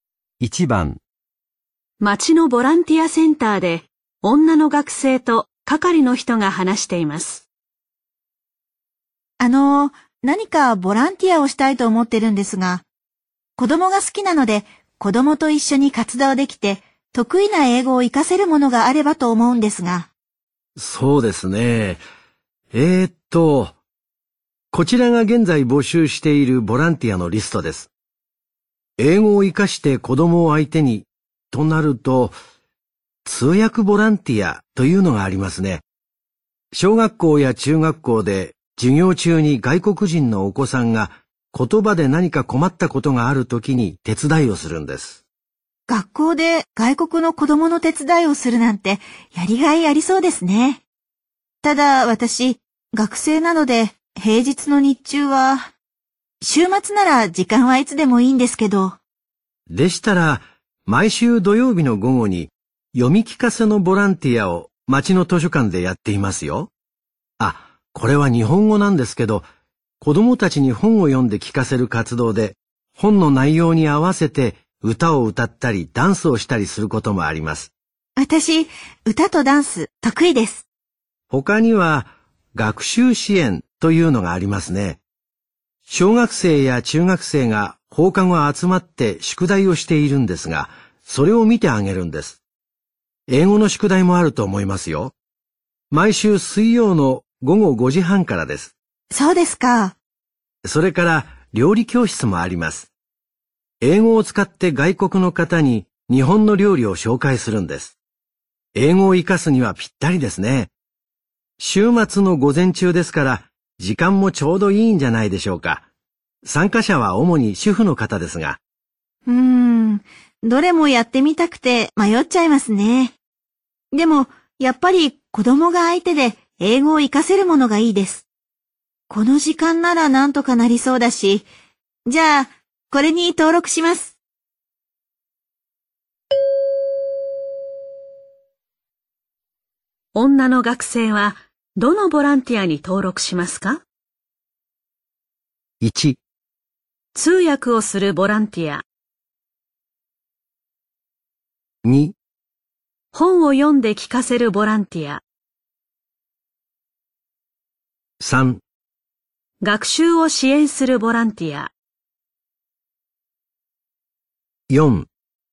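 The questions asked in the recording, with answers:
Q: 女の学生はどのボランティアに登録しますか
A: 3: 学習を支援するボランティア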